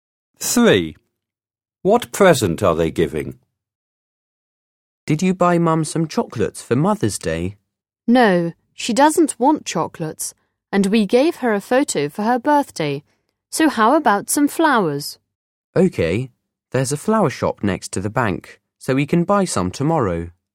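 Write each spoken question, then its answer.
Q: What present are they giving?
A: flowers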